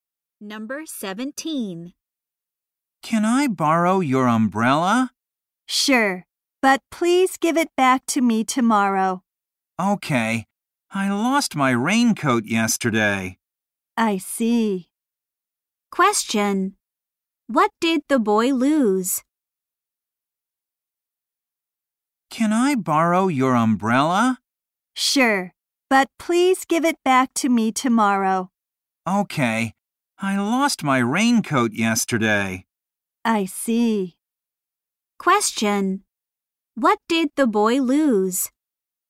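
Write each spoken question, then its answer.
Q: Question. What did the boy lose?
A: His raincoat.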